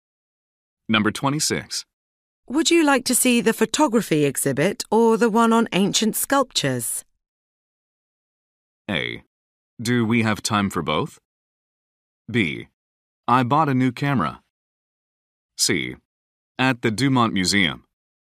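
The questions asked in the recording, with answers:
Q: Would you like to see the photography exhibit or the one on ancient sculptures?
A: A: Do we have time for both?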